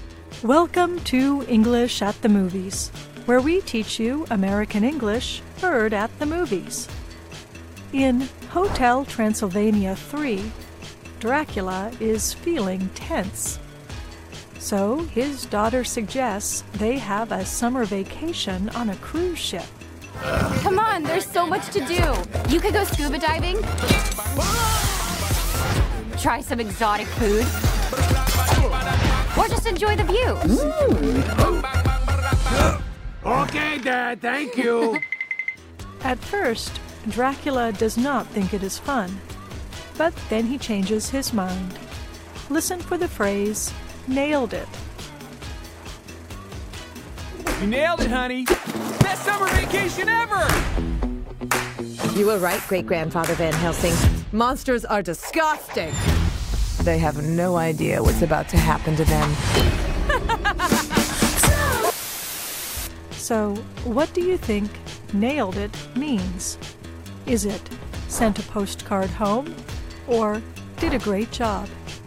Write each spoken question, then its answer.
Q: So, what do you think nailed it means? Is it sent a postcard home or did a great job?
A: Nailed it means did a great job.